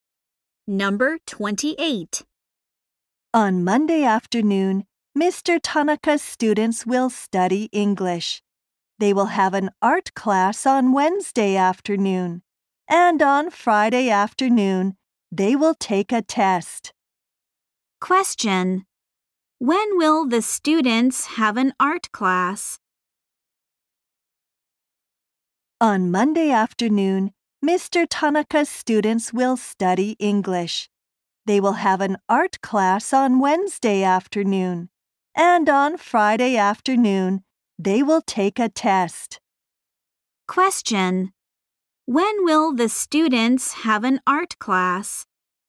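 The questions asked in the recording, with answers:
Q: When will the students have an art class?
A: On Wednesday afternoon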